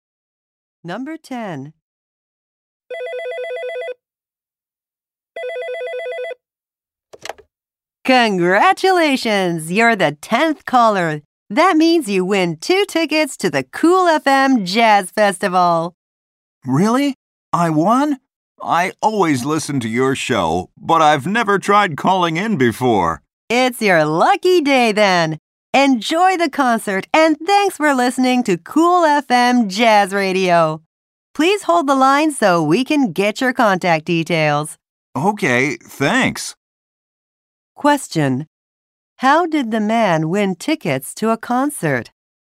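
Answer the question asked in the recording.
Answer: He was the 10th caller to the radio show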